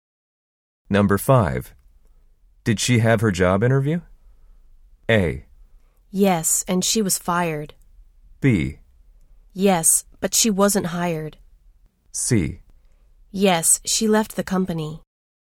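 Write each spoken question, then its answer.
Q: Did she have her job interview?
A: B: Yes, but she wasn't hired.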